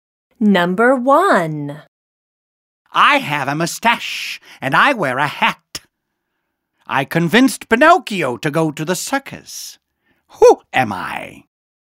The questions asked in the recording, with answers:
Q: Who am I?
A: I am the fox.